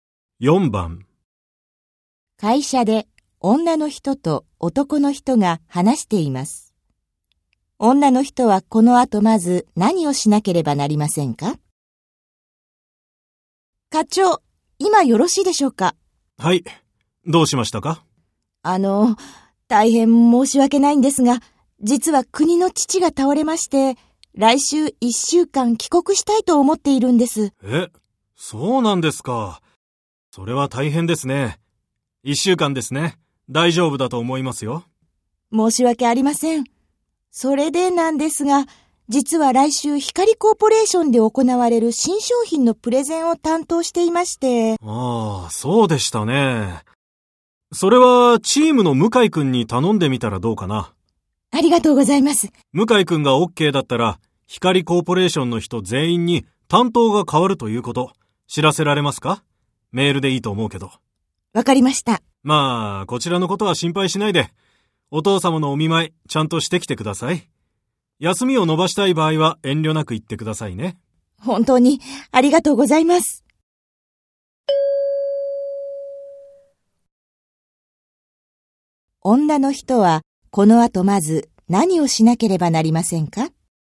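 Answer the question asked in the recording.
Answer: 向井くんにプレゼンの担当を頼む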